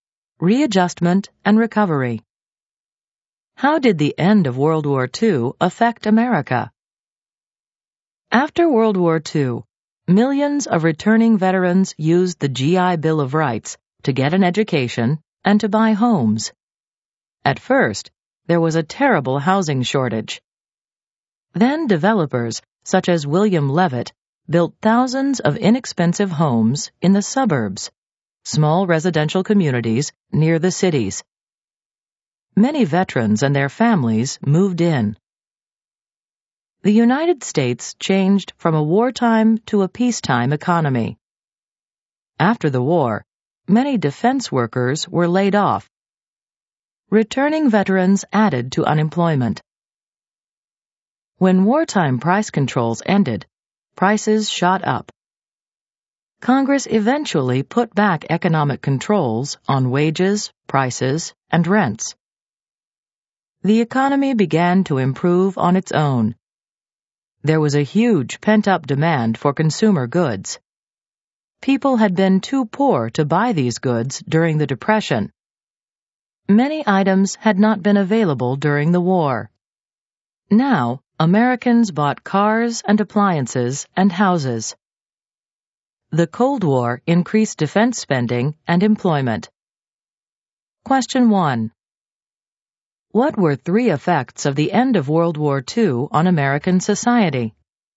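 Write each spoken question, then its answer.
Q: What were three effects of the end of World War II on American society?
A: Veterans used the GI Bill for education and homes; suburbs grew amid a housing shortage; the shift to a peacetime economy brought layoffs, unemployment and inflation, then a consumer boom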